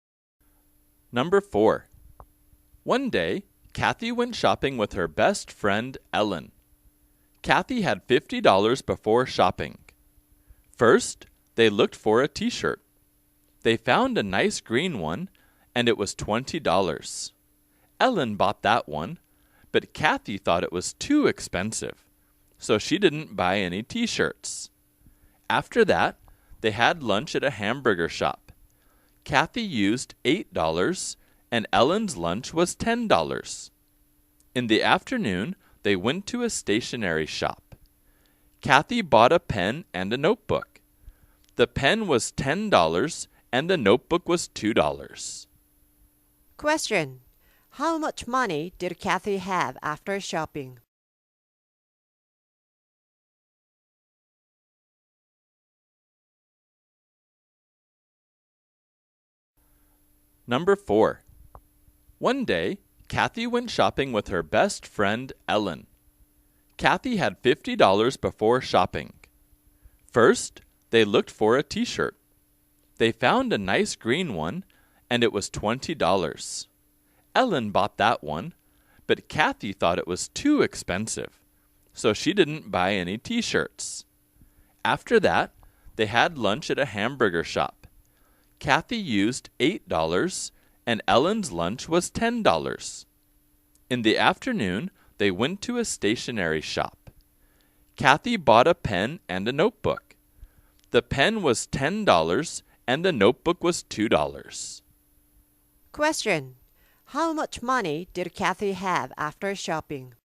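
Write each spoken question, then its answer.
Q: How much money did Kathy have after shopping?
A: $30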